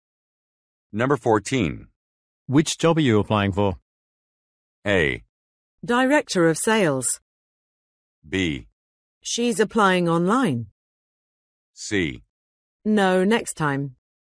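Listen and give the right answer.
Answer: A: Director of sales.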